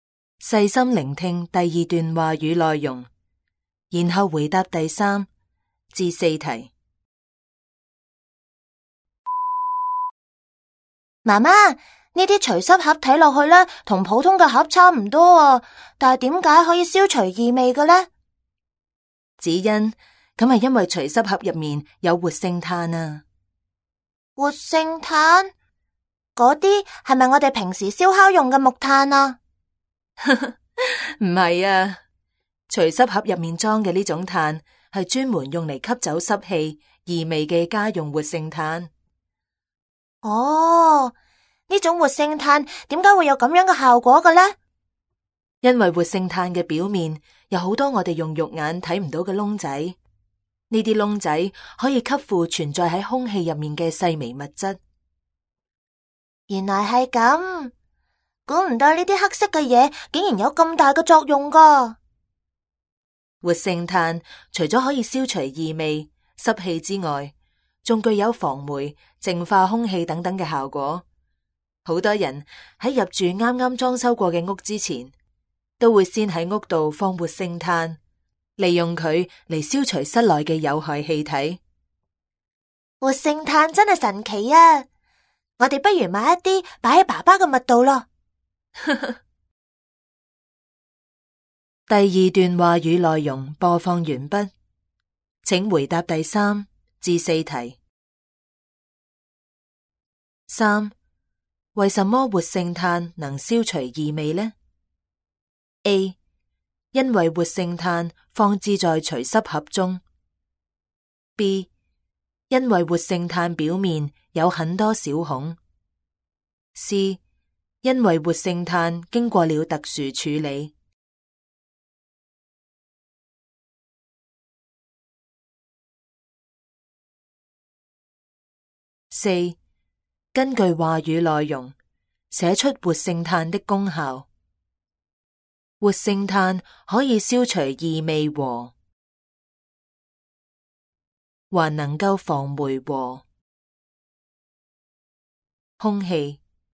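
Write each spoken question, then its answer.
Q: 为什么活性炭能消除异味呢? A, 因为活性炭放置在除湿盒中。 B, 因为活性炭表面有很多小孔。 C,因为活性炭经过了特殊处理。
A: B: 因为活性炭表面有很多小孔。

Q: 根据话语内容,写出活性炭的功效。活性炭可以消除异味和,还能够防霉和,空气。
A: 湿气;净化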